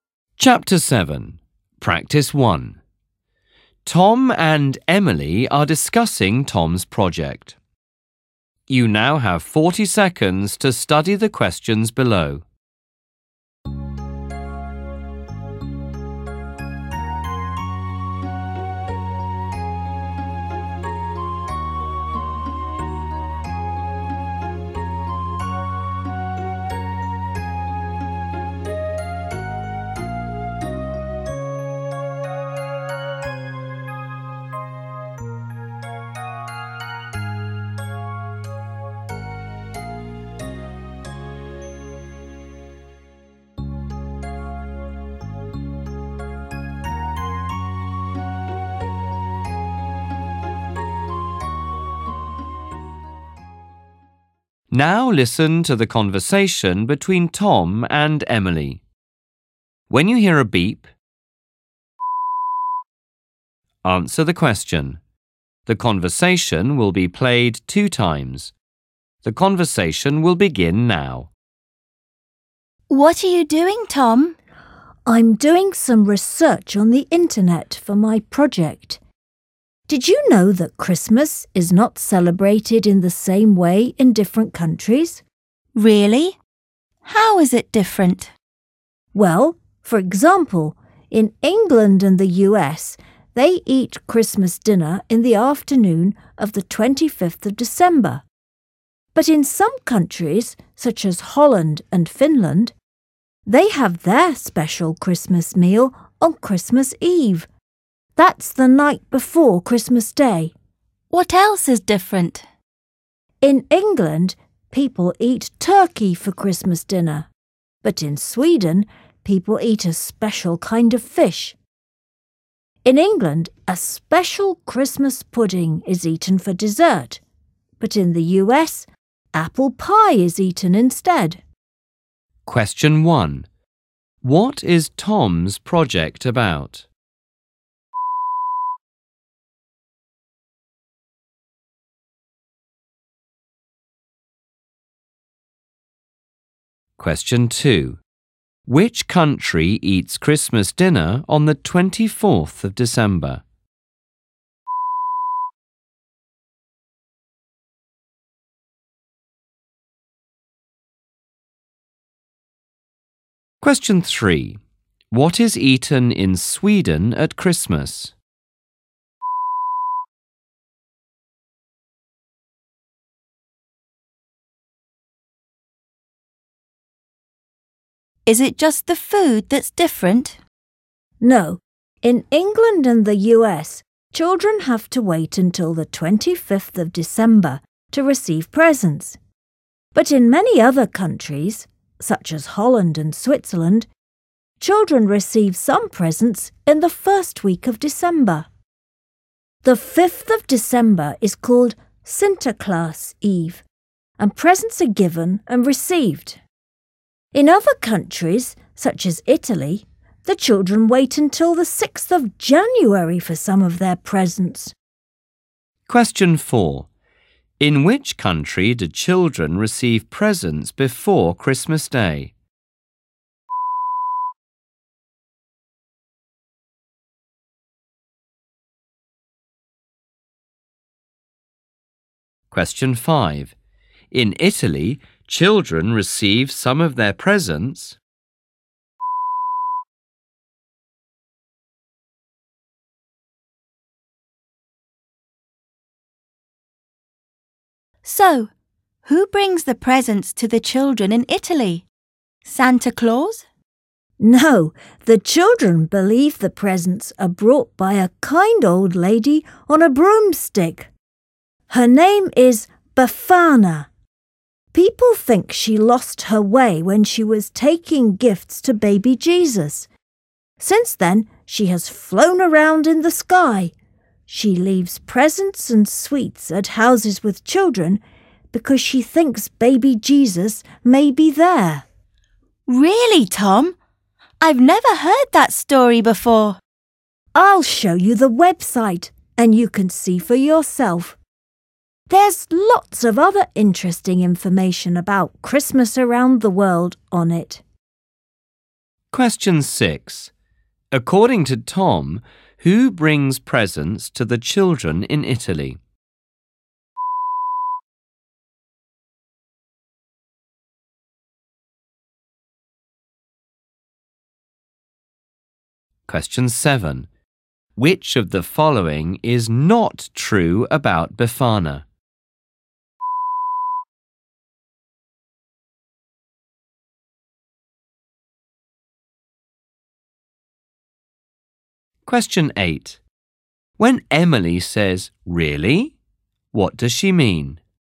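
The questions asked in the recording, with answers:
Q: What is Tom's project about?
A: How Christmas is celebrated differently in different countries

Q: Which country eats Christmas dinner on the 24th of December?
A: Holland or Finland

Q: What is eaten in Sweden at Christmas?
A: A special kind of fish

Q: In which country do children receive presents before Christmas Day?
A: Holland or Switzerland

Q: In Italy, children receive some of their presents.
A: On the 6th of January

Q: According to Tom, who brings presents to the children in Italy?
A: Befana, a kind old lady on a broomstick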